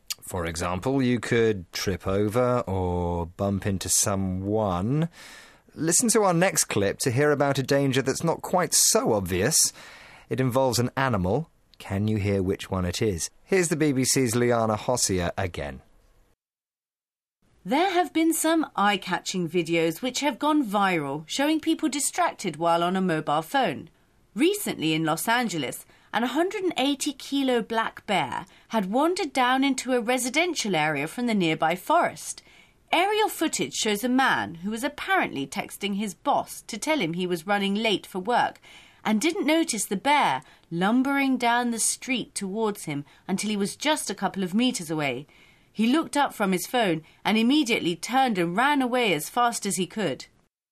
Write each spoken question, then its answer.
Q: Can you hear which one it is?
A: But he didn't see a bear lumbering down the street towards him.